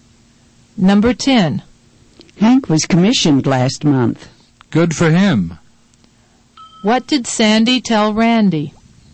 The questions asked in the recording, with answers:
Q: What did Sandy tell Randy?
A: She told Randy that Hank was commissioned last month.